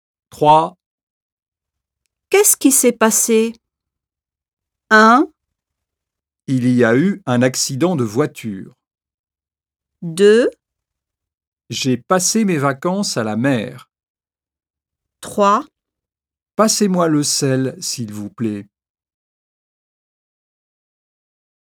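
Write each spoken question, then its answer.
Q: Qu'est-ce qui s'est passé?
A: 1: Il y a eu un accident de voiture.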